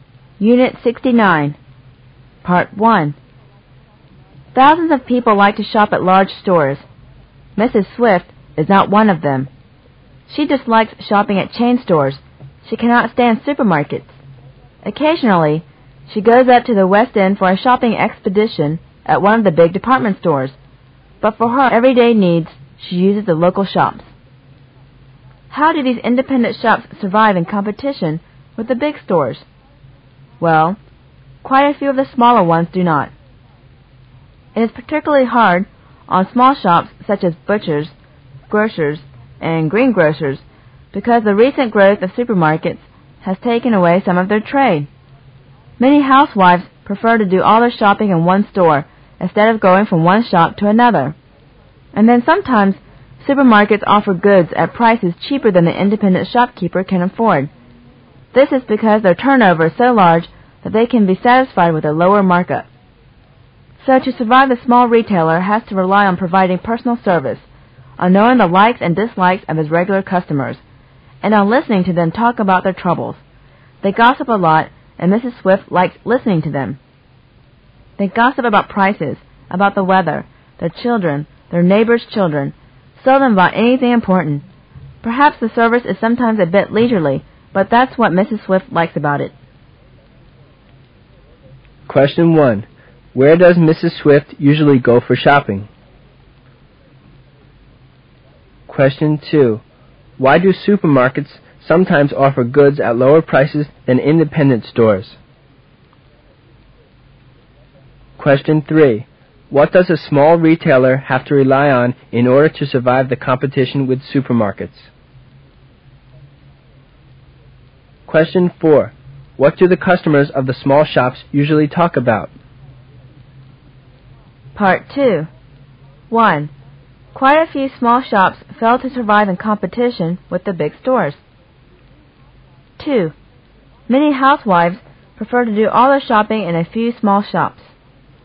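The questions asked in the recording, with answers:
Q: Where does Mrs.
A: The local shops

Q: Why do supermarkets sometimes offer goods at lower prices than independent stores?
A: Their turnover is so large they accept a lower markup

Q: What does a small retailer have to rely on in order to survive the competition with supermarkets?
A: Personal service and knowing regular customers

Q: What do the customers of the small shops usually talk about?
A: Prices, the weather, their children, neighbors' children

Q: Quite a few small shops fail to survive in competition with the big stores.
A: True

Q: Many housewives prefer to do all their shopping in a few small shops.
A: False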